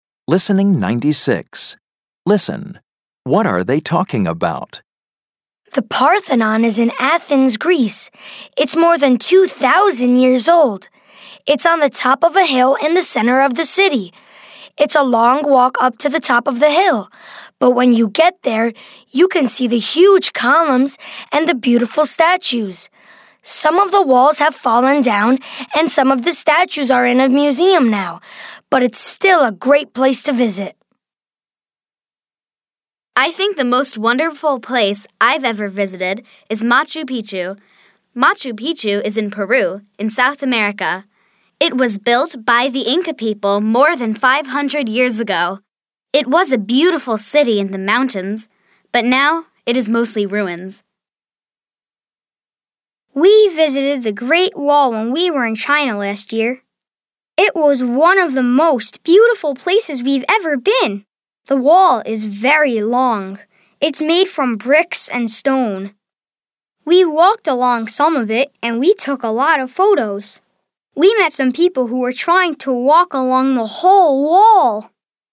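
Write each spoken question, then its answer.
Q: What are they talking about?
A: Famous old places they have visited (the Parthenon, Machu Picchu, the Great Wall)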